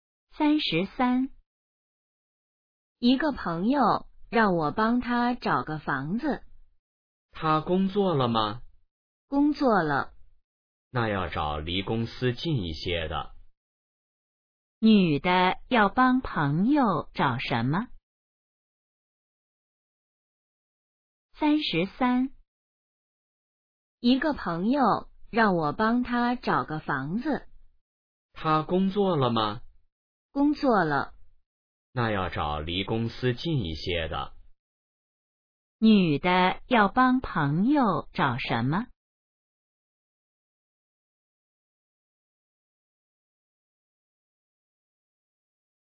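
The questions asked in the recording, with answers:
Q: 女的要帮朋友找什么?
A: 房子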